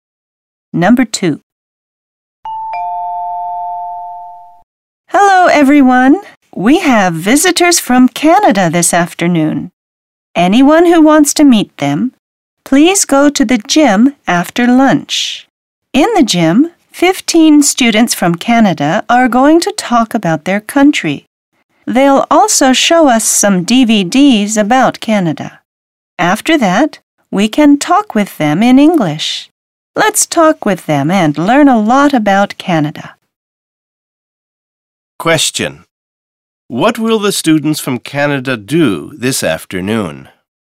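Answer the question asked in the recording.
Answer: They will talk about their country, show DVDs about Canada and talk with the students in English.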